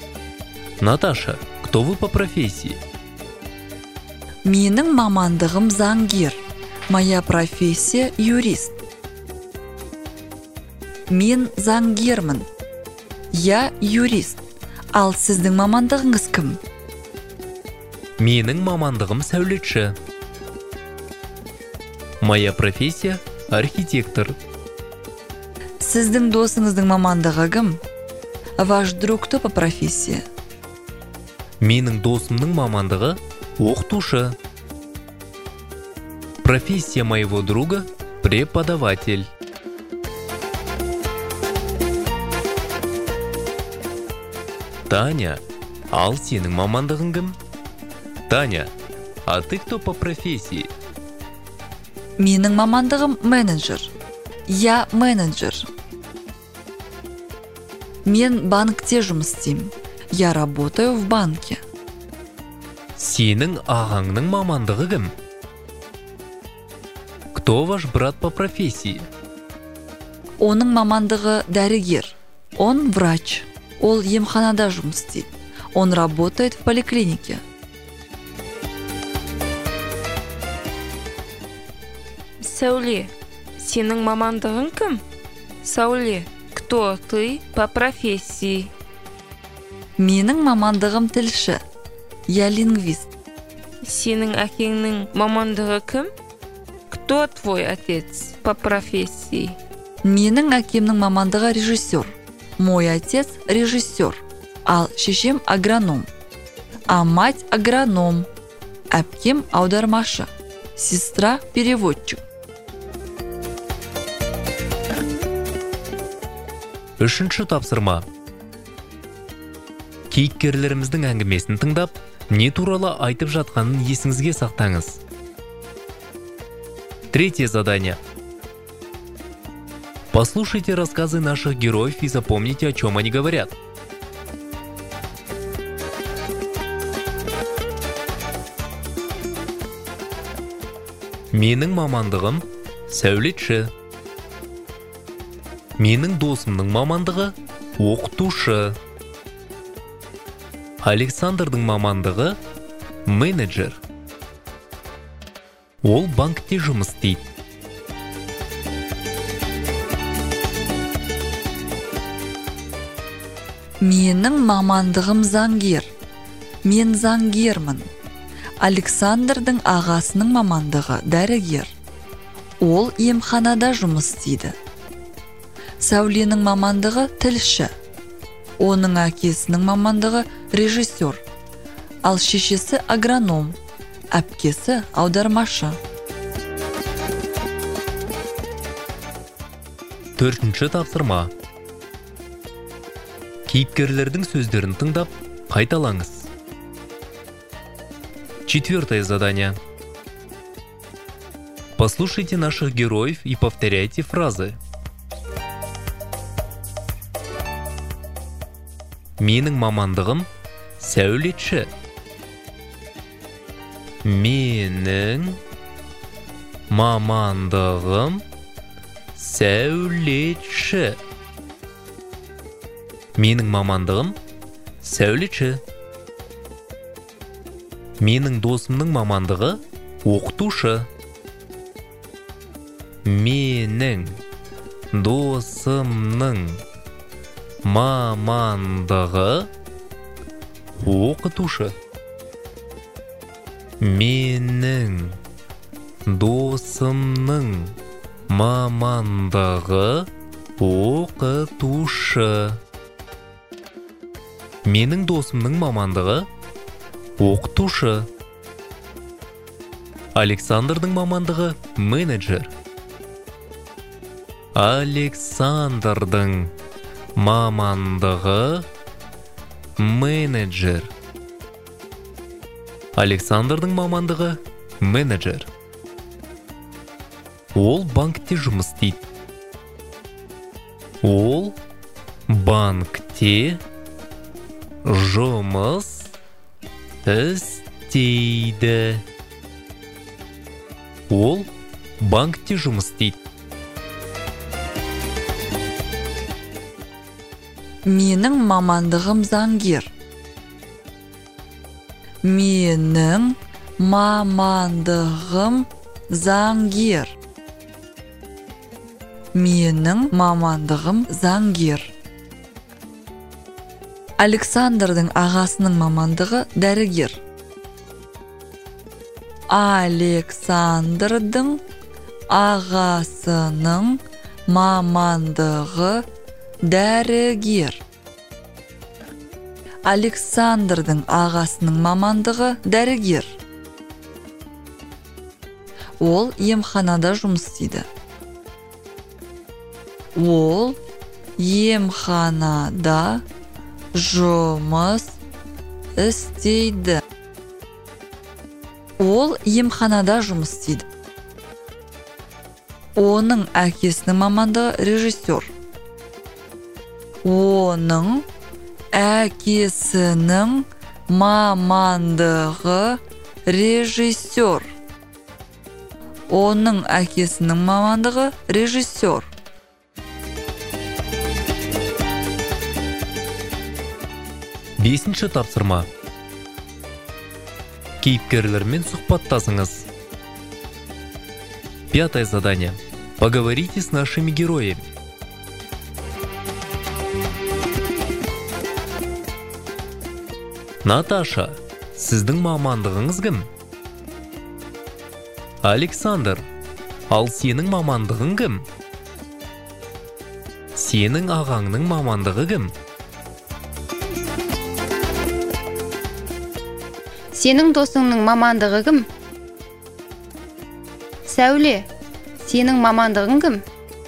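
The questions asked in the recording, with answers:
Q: Наташа, сіздің мамандығыңыз кім?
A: заңгер

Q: Александр, ал сенің мамандығың кім?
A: менеджер

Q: Сенің ағаңның мамандығы кім?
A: дәрігер

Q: Сәуле, сенің мамандығың кім?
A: тілші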